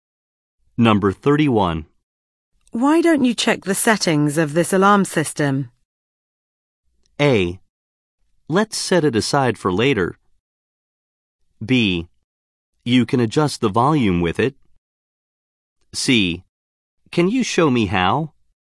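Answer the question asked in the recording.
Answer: C: Can you show me how?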